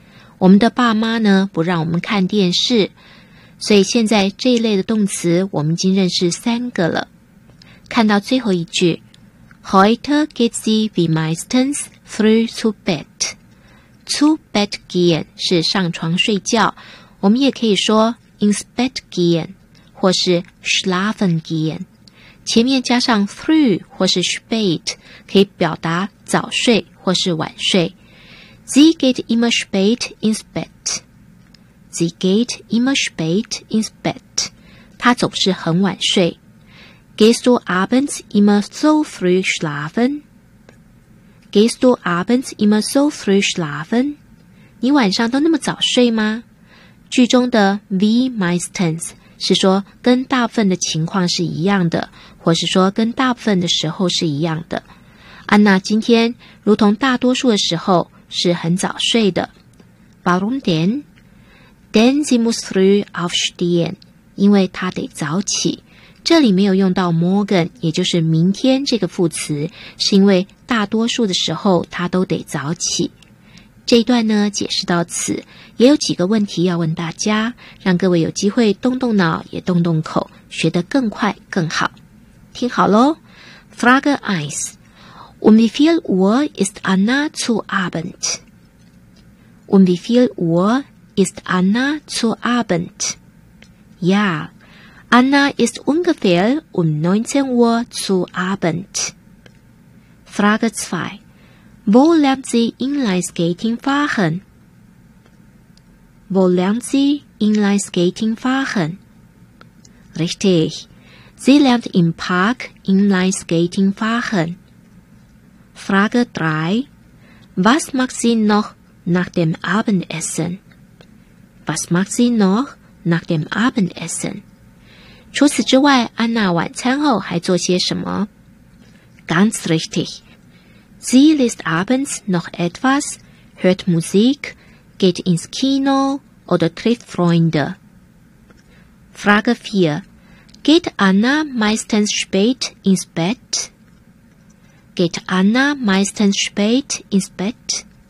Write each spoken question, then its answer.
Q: Geht Anna meistens spät ins Bett?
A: Nein, sie geht meistens früh schlafen.